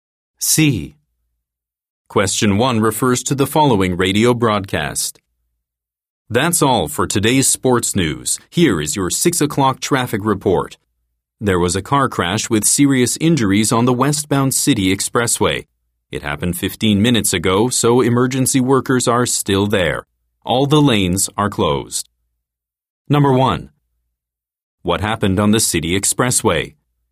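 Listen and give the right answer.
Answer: A car crash with serious injuries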